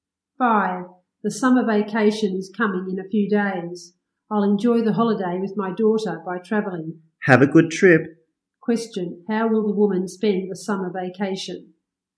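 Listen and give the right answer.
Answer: By traveling with her daughter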